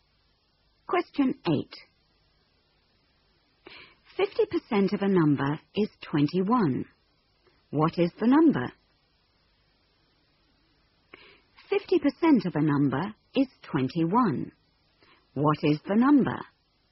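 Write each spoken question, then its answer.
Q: 50% of a number is 21. What is the number?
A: 42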